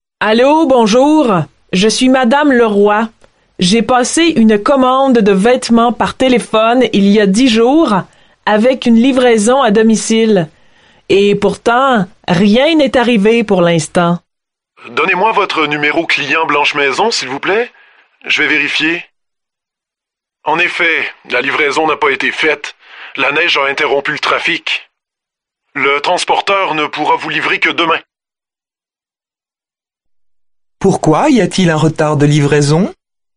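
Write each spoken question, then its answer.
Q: Pourquoi y a-t-il un retard de livraison?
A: À cause de la neige, qui a interrompu le trafic.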